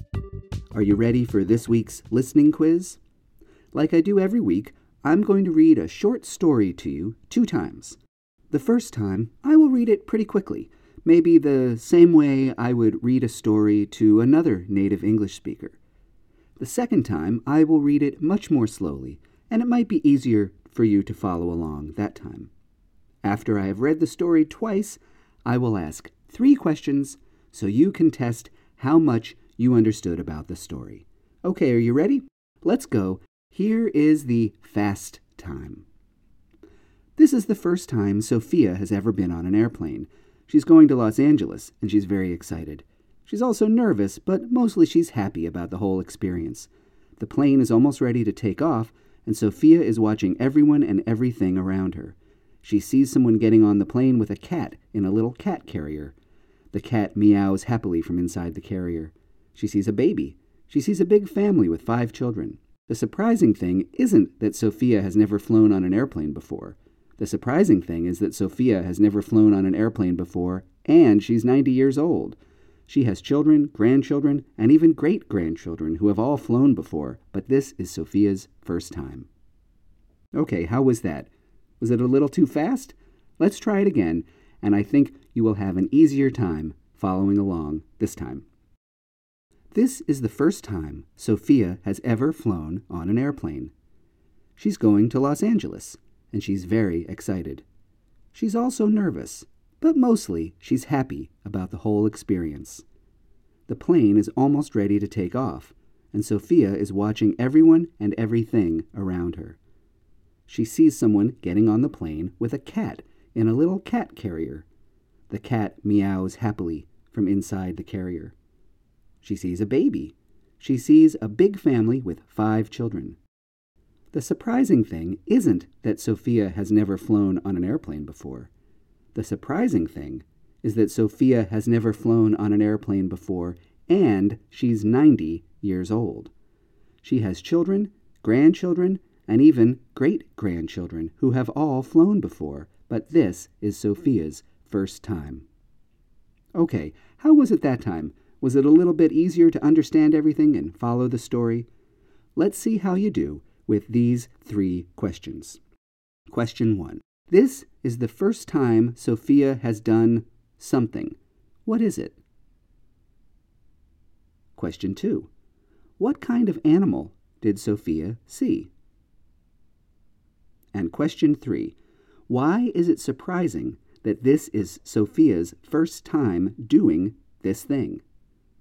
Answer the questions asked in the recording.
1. It's the first time Sophia has flown on an airplane.
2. Sophia saw a cat on the airplane.
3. It's surprising because Sophia is 90 years old.